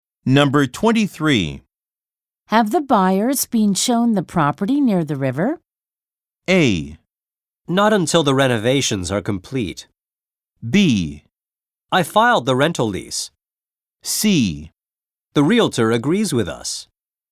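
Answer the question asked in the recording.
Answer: A: Not until the renovations are complete.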